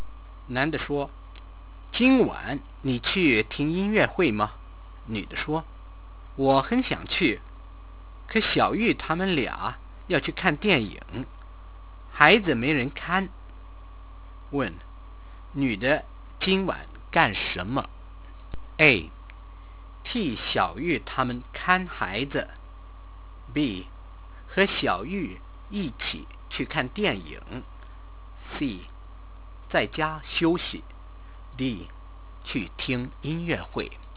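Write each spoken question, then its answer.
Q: 女的今晚干什么?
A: A: 替小玉他们看孩子。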